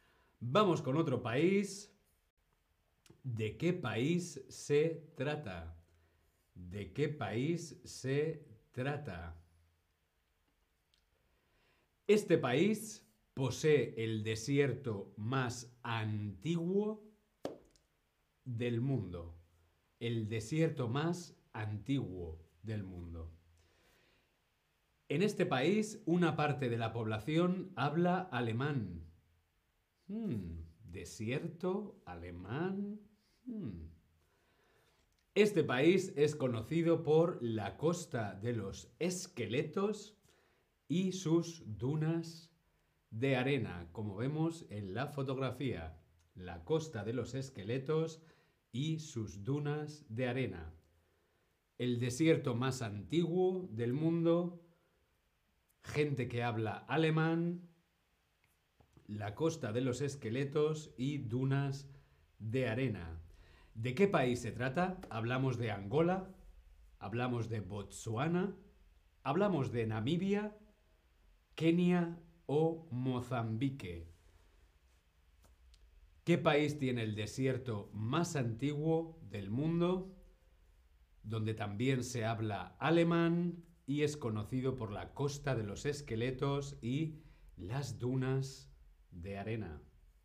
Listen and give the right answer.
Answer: Muy, muy bien, claro que sí, Namibia.